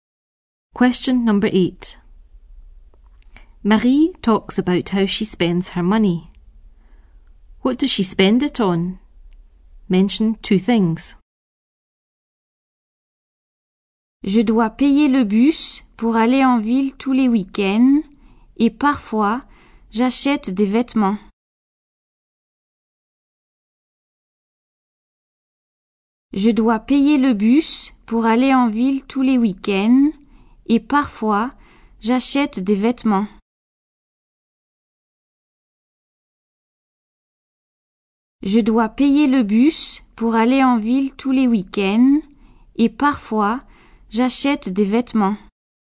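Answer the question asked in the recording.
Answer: The bus into town every weekend; sometimes clothes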